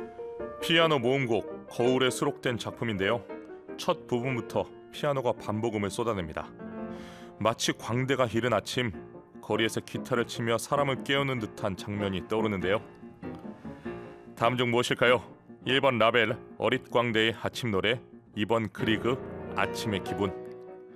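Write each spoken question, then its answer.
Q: 다음 중 무엇일까요? 1번 라벨, 어릿 광대의 아침 노래, 2번 그리그, 아침의 기분.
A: 1: 라벨, 어릿광대의 아침 노래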